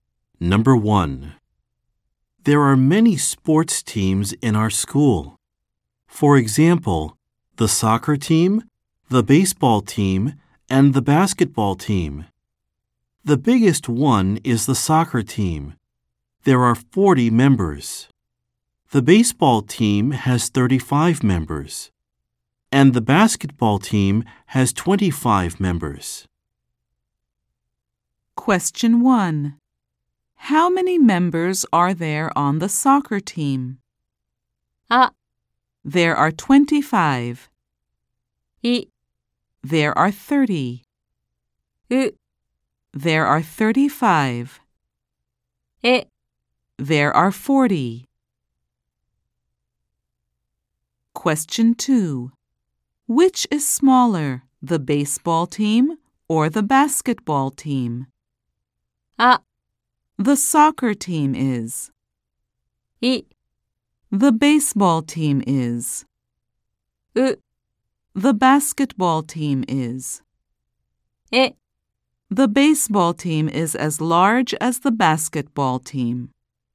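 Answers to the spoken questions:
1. え: There are 40.
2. う: The basketball team is.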